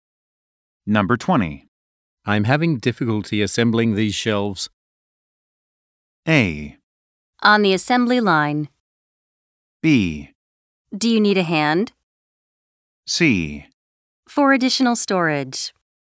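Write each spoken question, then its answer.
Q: I'm having difficulty assembling these shelves.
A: B: Do you need a hand?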